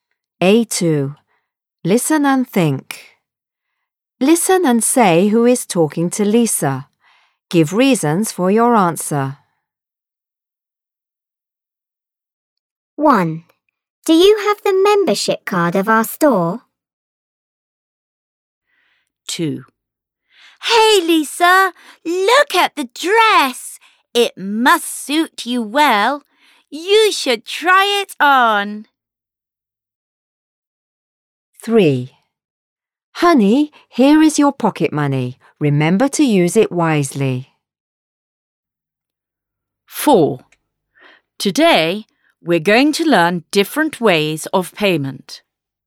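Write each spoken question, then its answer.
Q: Listen and say who is talking to Lisa.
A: A shop assistant

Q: Listen and say who is talking to Lisa.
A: Her mum

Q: Listen and say who is talking to Lisa.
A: Her teacher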